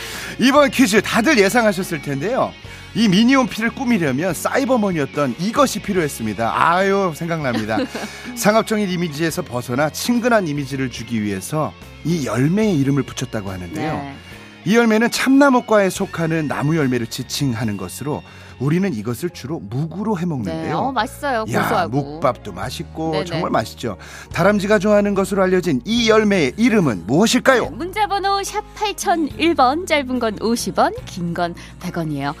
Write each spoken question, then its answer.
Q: 다람쥐가 좋아하는 것으로 알려진 이 열매의 이름은 무엇일까요?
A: 도토리입니다.